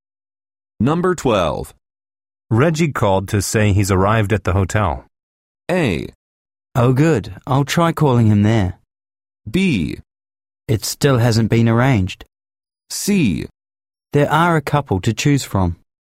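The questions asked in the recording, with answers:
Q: Reggie called to say he's arrived at the hotel.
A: A: Oh, good. I'll try calling him there.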